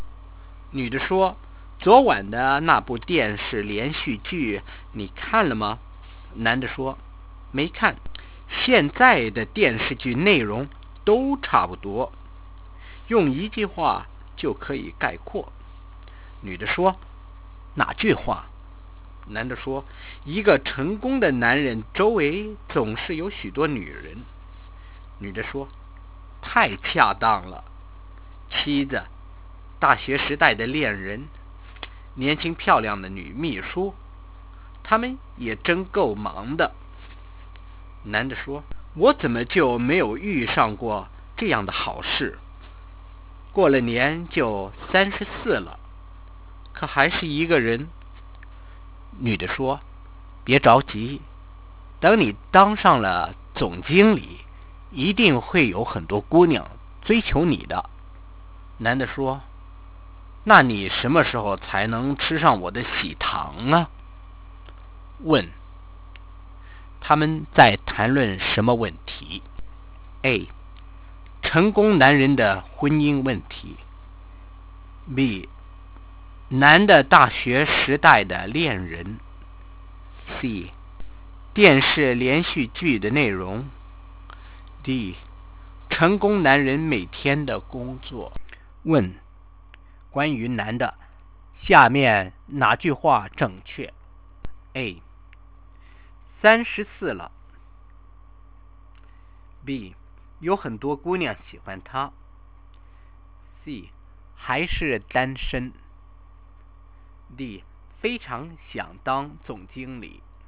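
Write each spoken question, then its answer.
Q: 他们在谈论什么问题?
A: C: 电视连续剧的内容。

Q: 关于男的,下面哪句话正确?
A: C: 还是单身。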